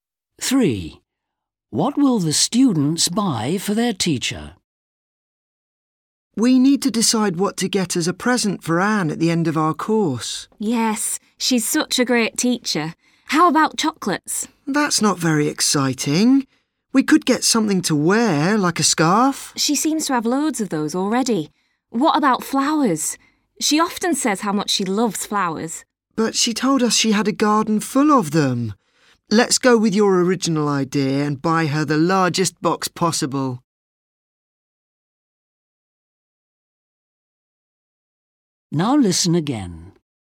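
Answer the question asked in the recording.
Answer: a large box of chocolates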